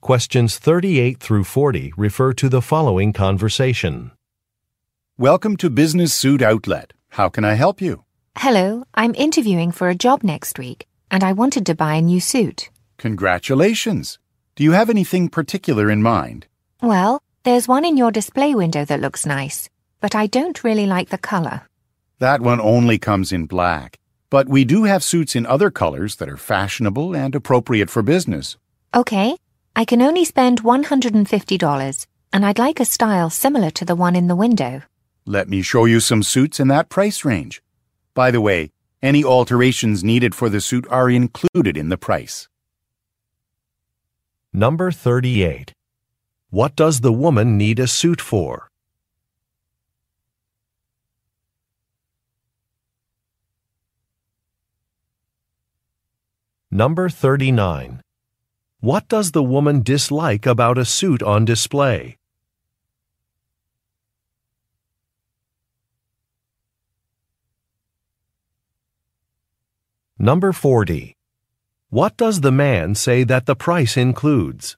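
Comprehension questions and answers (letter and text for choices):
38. What does the woman need a suit for?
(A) A job interview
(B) A fashion show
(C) A family celebration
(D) A television appearance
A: (A) A job interview

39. What does the woman dislike about a suit on display?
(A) The fabric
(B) The price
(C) The style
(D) The color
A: (D) The color

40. What does the man say that the price includes?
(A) Some accessories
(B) Alterations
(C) Sales tax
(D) Delivery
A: (B) Alterations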